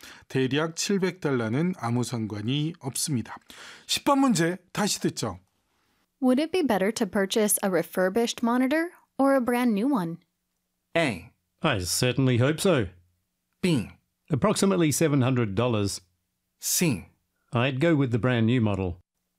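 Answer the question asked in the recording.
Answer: C: I'd go with the brand new model.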